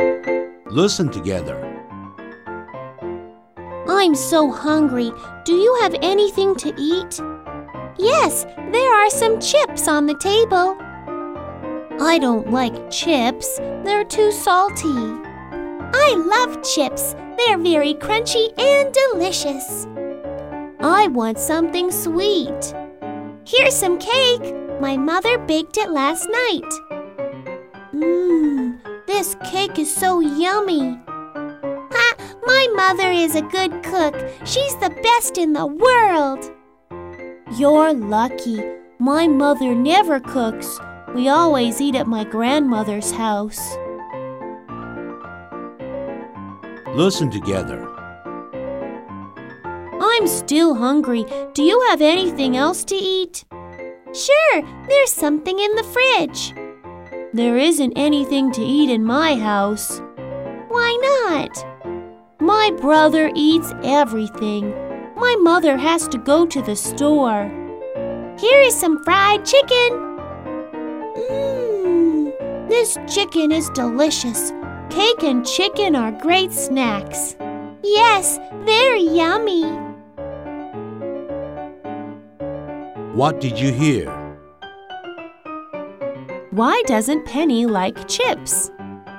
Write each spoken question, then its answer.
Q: Why doesn't Penny like chips?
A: She doesn't like chips because they are too salty.